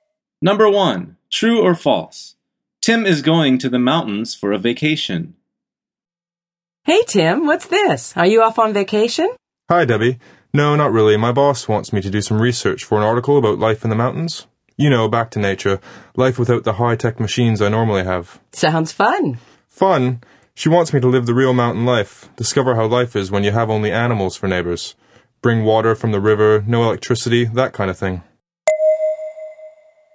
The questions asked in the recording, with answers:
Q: Tim is going to the mountains for a vacation.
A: The answer is false.